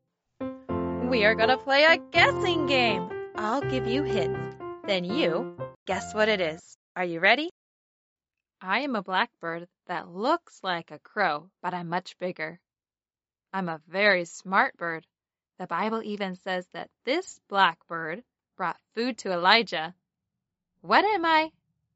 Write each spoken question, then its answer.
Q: What am I?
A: Raven.